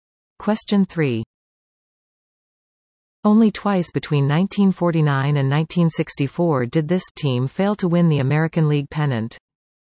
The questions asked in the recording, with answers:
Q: Only twice between 1949 and 1964 did this team fail to win the American League pennant.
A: The New York Yankees.